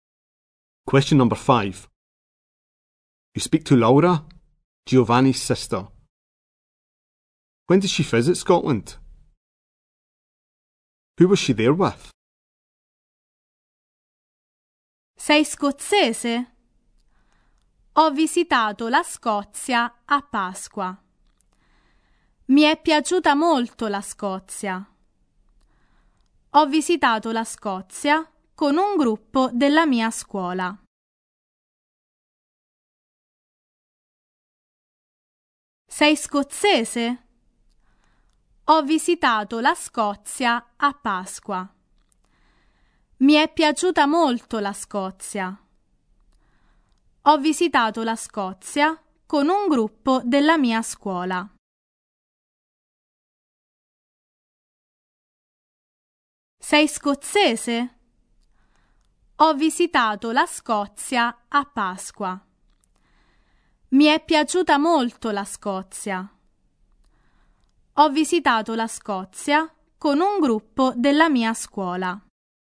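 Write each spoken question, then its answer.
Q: When did she visit Scotland?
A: At Easter

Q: Who was she there with?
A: A group from her school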